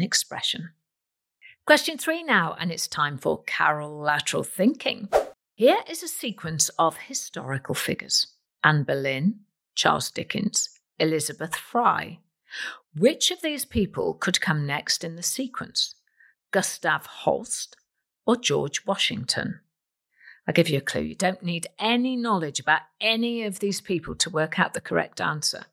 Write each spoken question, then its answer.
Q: Which of these people could come next in the sequence?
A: And the answer is Gustav Holst, and it's got nothing to do with history.